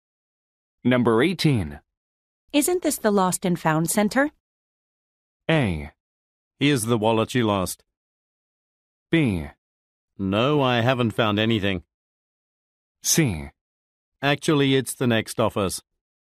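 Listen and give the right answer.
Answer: C: Actually, it's the next office.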